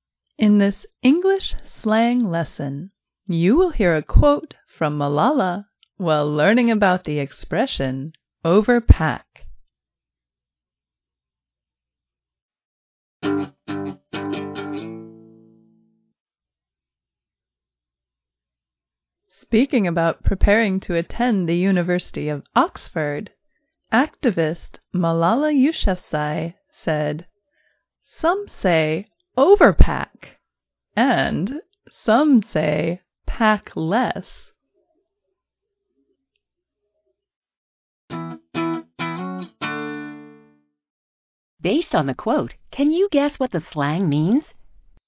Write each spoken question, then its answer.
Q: Based on the quote, can you guess what the slang means?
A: Overpack is a verb meaning bring more than one needs on a trip.